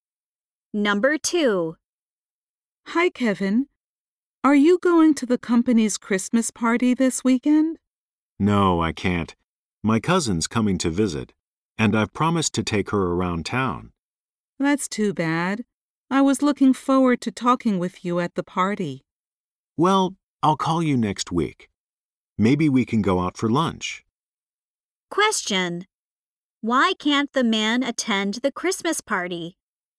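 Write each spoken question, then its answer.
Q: Why can't the man attend the Christmas party?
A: He promised to show his visiting cousin around town.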